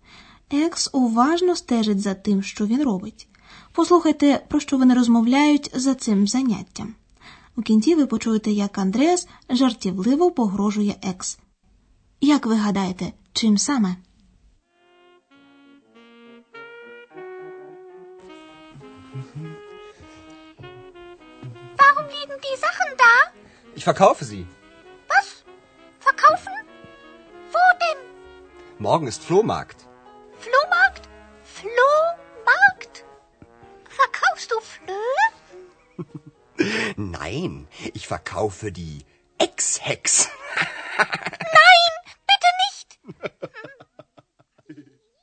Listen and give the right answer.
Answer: Андреас, звичайно, жартома, погрожує екс, що разом зі старими речами продасть на блошиному ринку її.